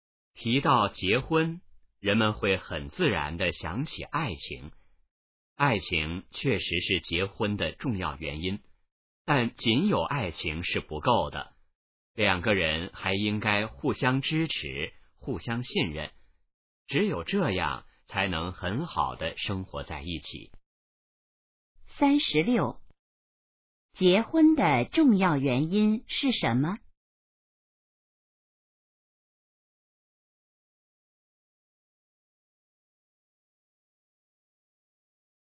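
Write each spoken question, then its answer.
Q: 结婚的重要原因是什么?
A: 爱情

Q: 两个人怎样才能很好的一起生活?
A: 互相支持,互相信任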